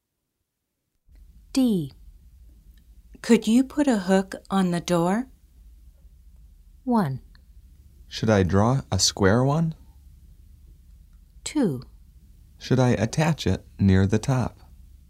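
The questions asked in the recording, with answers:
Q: Could you put a hook on the door?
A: 2: Should I attach it near the top?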